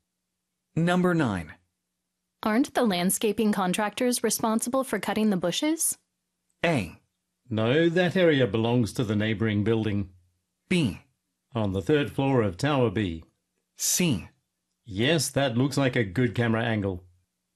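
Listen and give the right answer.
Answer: A: No, that area belongs to the neighboring building.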